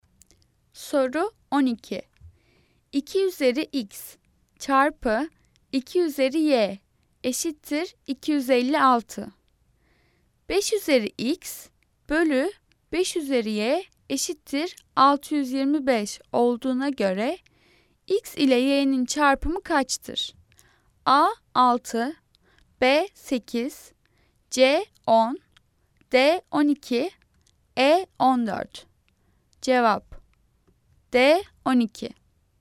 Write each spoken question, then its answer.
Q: 5 üzeri x bölü 5 üzeri y eşittir 625 olduğuna göre x ile y'nin çarpımı kaçtır?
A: Cevap D 12.